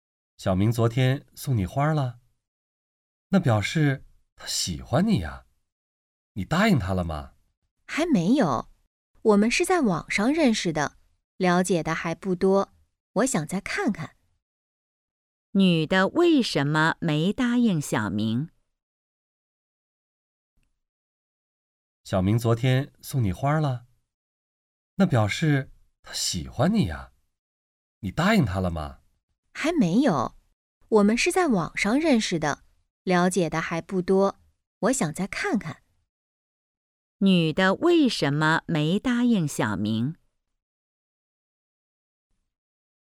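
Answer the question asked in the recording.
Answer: 对小明了解得还不多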